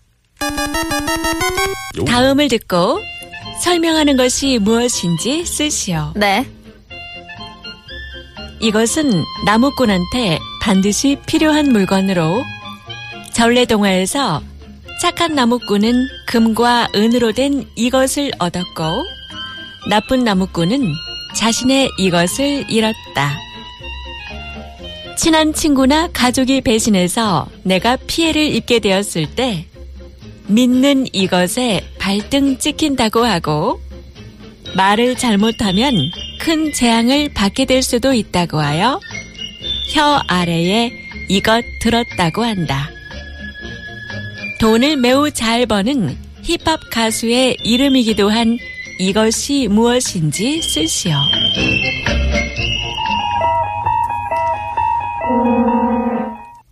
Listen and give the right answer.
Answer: Toki!